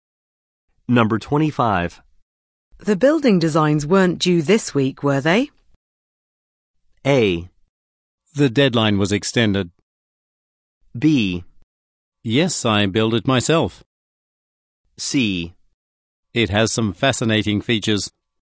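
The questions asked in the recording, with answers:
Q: The building designs weren't due this week, were they?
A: A: The deadline was extended.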